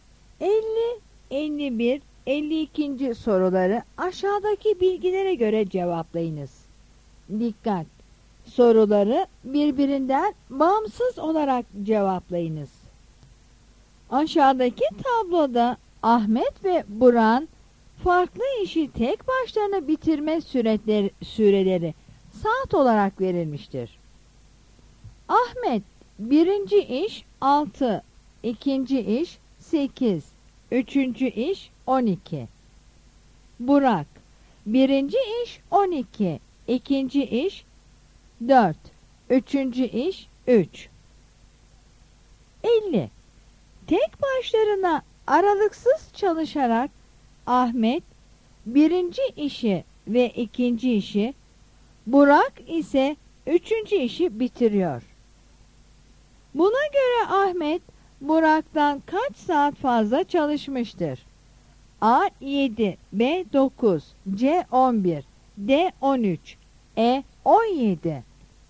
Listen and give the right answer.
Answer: Yanıt C'dir.